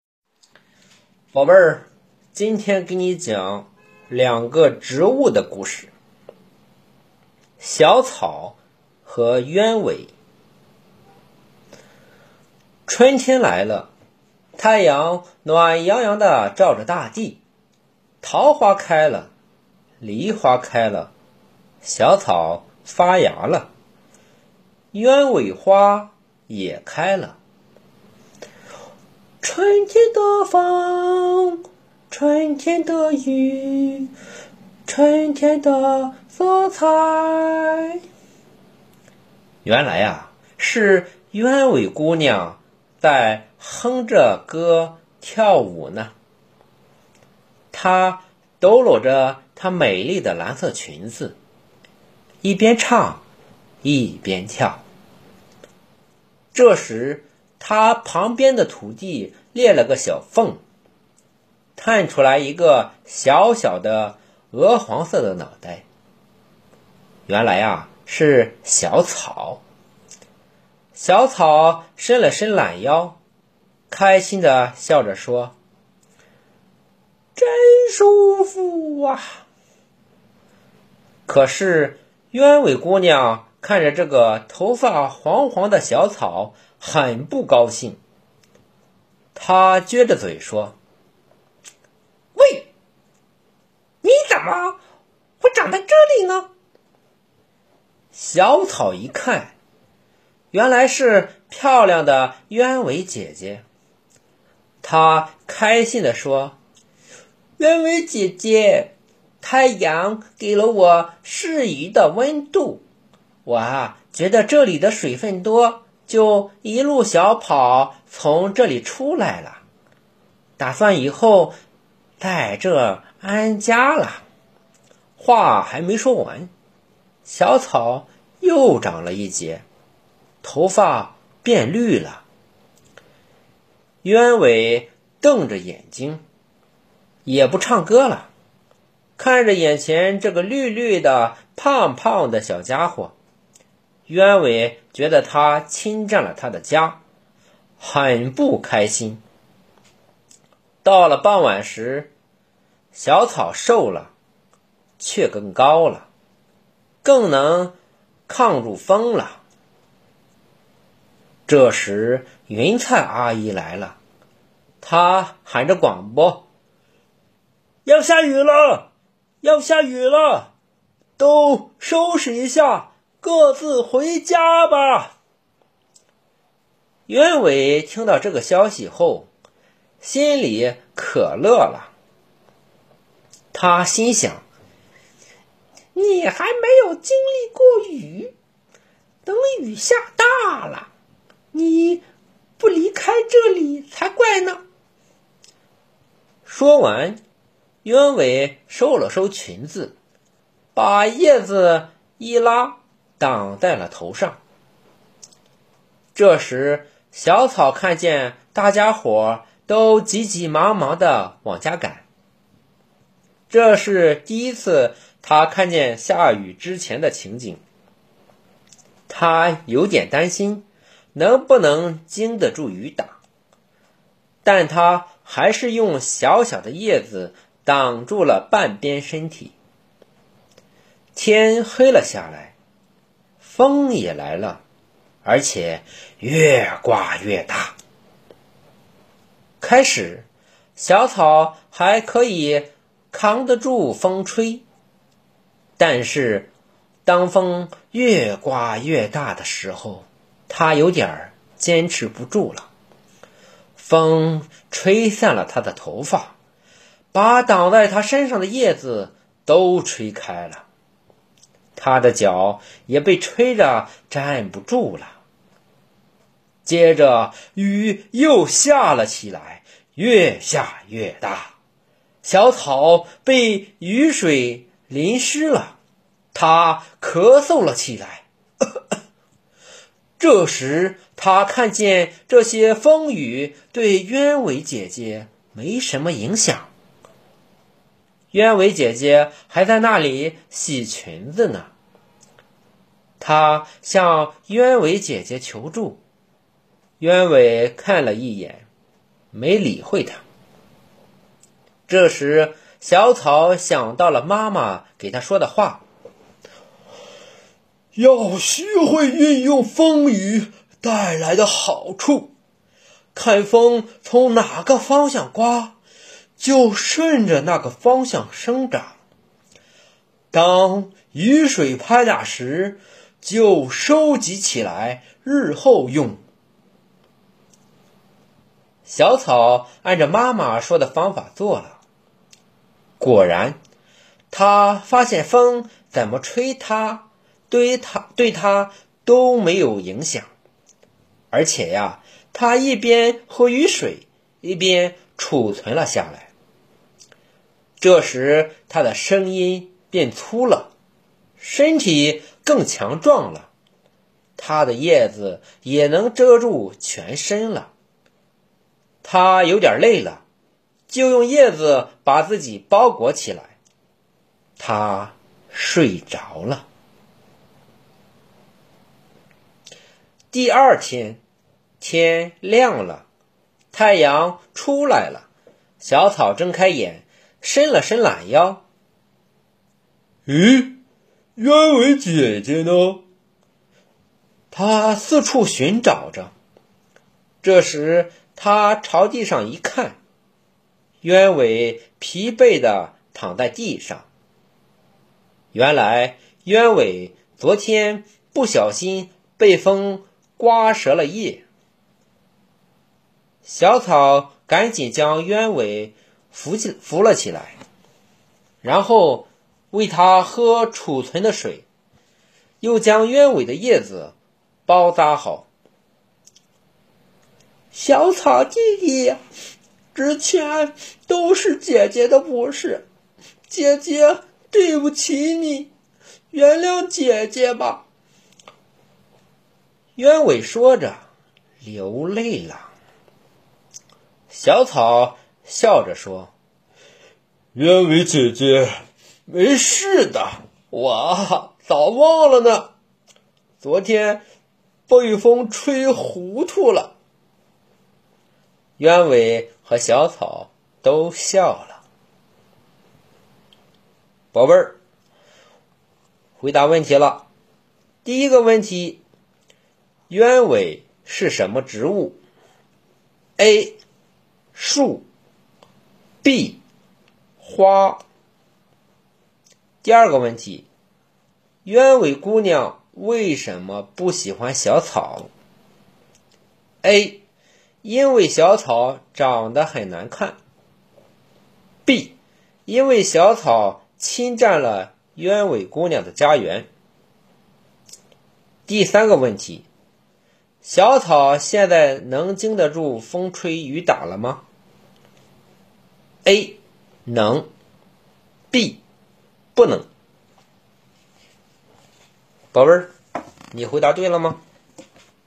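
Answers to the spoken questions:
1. B: 花
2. B: 因为小草侵占了鸢尾姑娘的家园
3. A: 能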